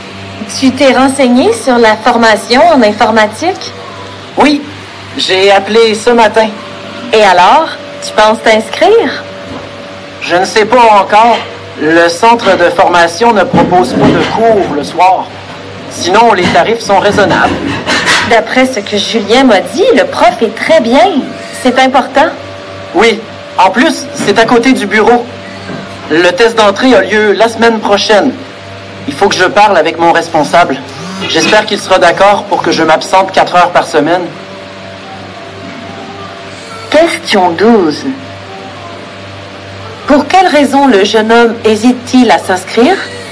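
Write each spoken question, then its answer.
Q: Pour quelle raison le jeune homme hésite-t-il à s'inscrire?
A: Le centre de formation ne propose pas de cours le soir.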